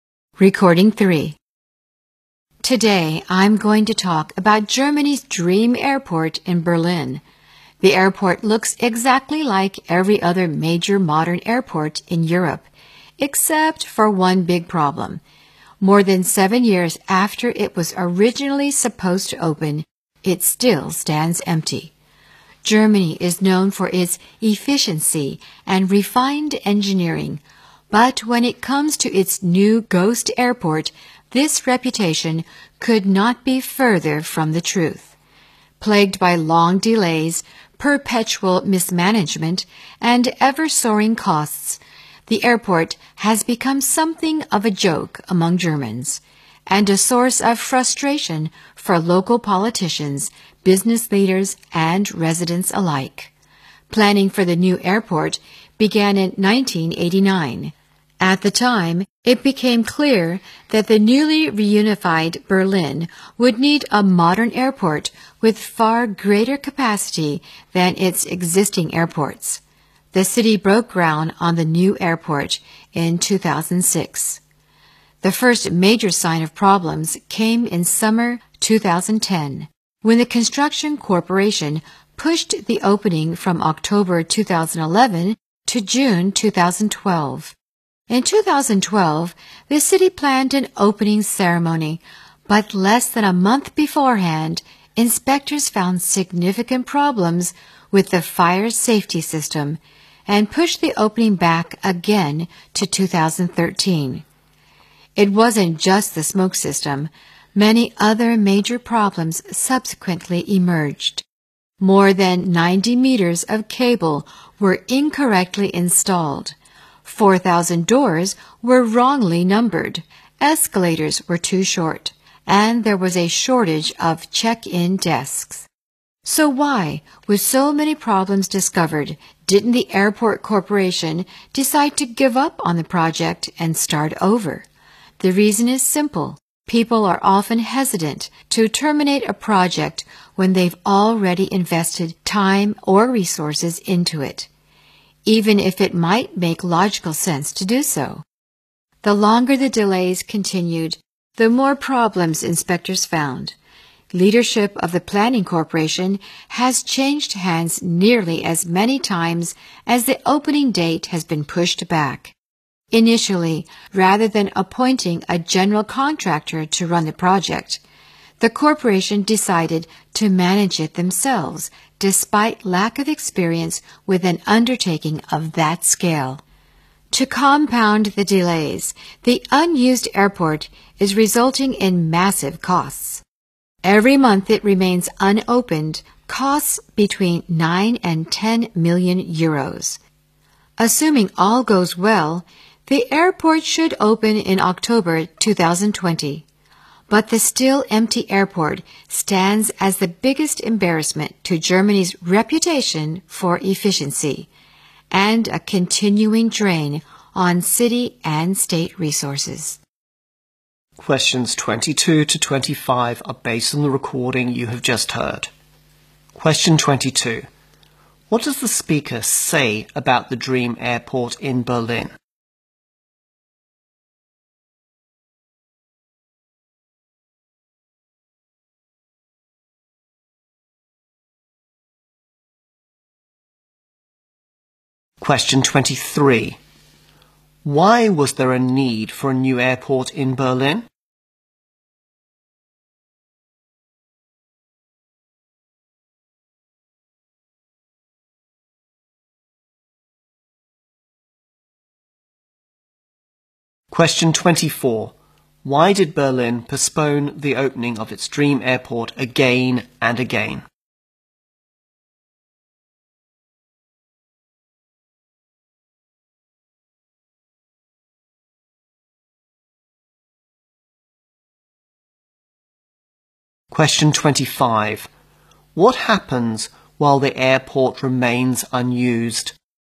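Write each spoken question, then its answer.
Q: What does the speaker say about the dream airport in Berlin?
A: It still stands empty, more than seven years after it was supposed to open.

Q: Why was there a need for a new airport in Berlin?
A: The newly reunified Berlin needed an airport with far greater capacity.

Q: Why did Berlin postpone the opening of its dream airport again and again?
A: Inspectors kept finding problems, starting with the fire safety system.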